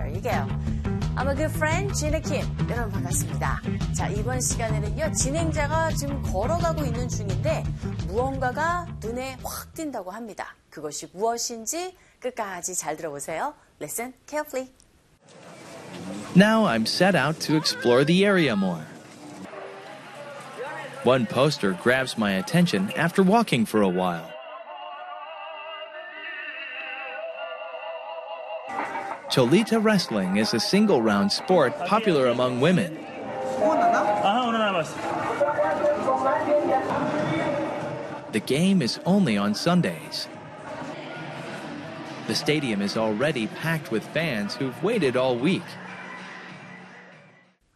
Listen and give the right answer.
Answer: There you go. Poster. 포스터가 눈에 확 사로잡힌 거죠.